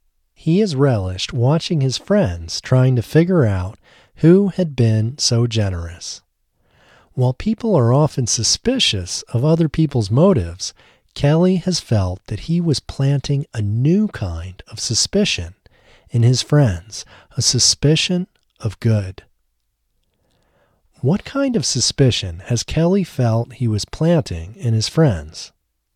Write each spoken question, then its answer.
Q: What kind of suspicion has Kelly felt he was planting in his friends?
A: Kelly has felt that he was planting a new kind of suspicion in his friends, a suspicion of good.